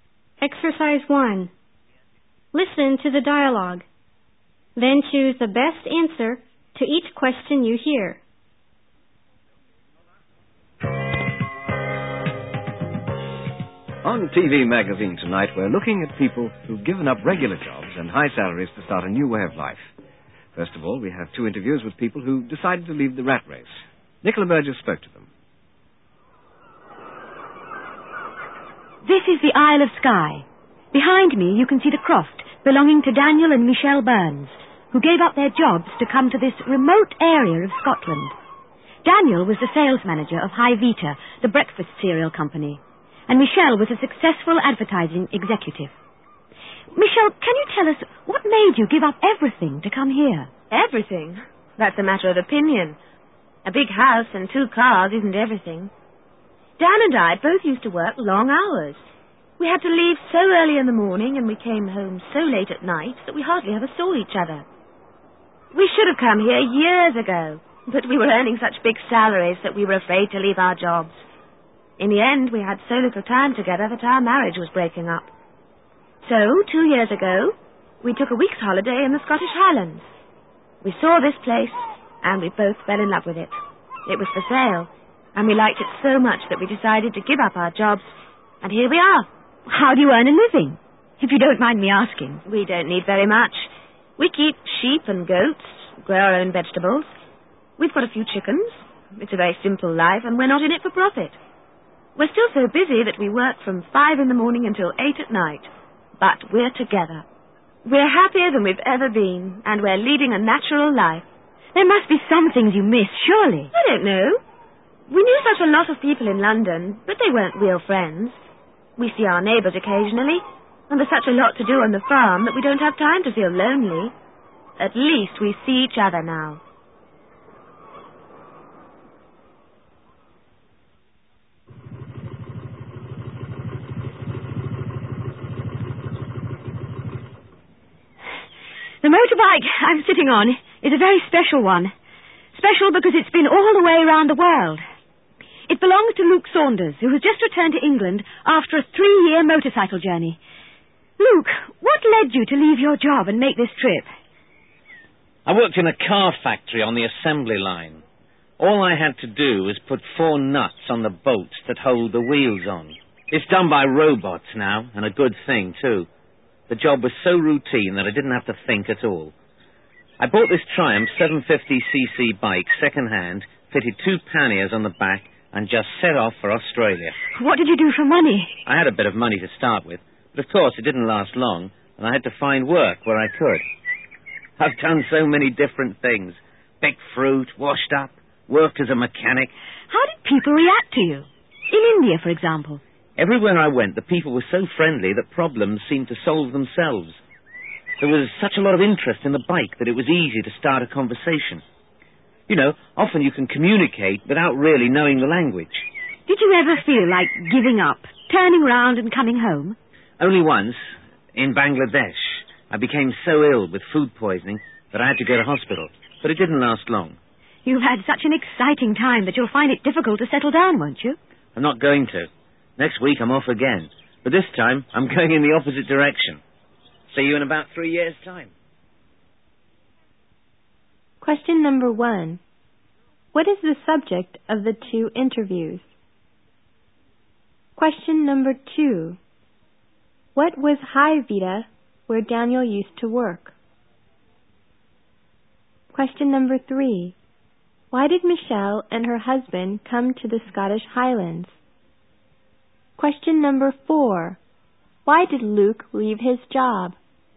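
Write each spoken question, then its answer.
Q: What is the subject of the 2 interviews?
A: People who gave up regular jobs and high salaries to start a new way of life

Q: What was High Vita, where Daniel used to work?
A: A breakfast cereal company

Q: Why did Michelle and her husband come to the Scottish Highlands?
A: They were so busy they hardly saw each other and their marriage was breaking up, so they gave up their jobs to live a simpler life together

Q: Why did Luke leave his job?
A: The job was so routine and boring that he didn't have to think at all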